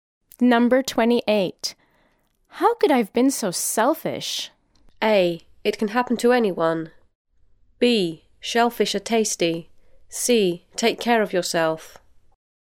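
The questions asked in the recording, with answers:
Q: How could I have been so selfish?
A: A: It can happen to anyone.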